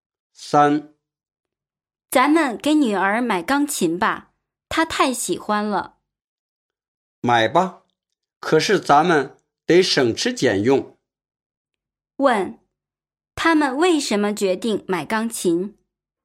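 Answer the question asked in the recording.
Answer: 因为女儿太喜欢钢琴了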